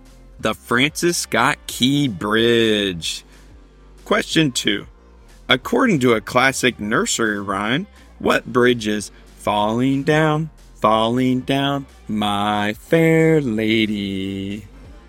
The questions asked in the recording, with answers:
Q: According to a classic nursery rhyme, what bridge is falling down, my fair lady?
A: London Bridge. Despite many structural failures, London Bridge never actually fell down.